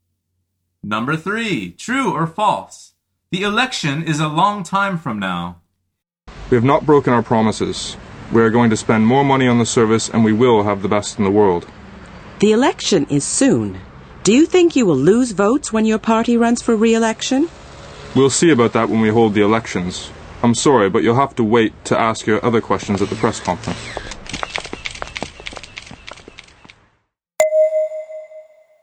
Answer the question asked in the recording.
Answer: The answer is false.